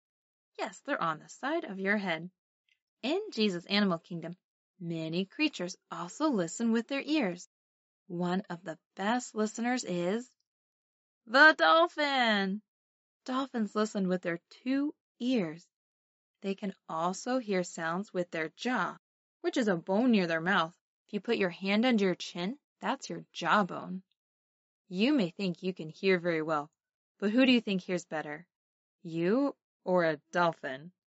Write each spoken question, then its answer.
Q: You may think you can hear very well, but who do you think hears better? You or a dolphin?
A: Yes, dolphins can hear much better.